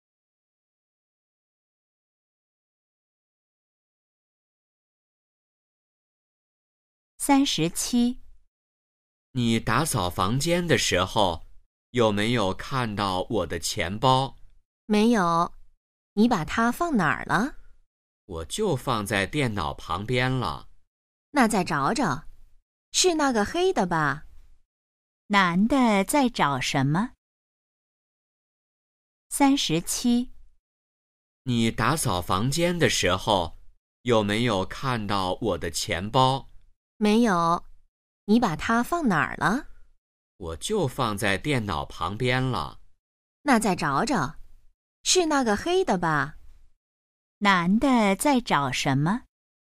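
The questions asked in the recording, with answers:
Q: 男的在找什么?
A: 钱包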